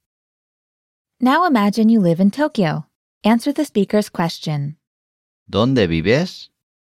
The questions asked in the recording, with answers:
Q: ¿Dónde vives?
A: Vivo en Tokio.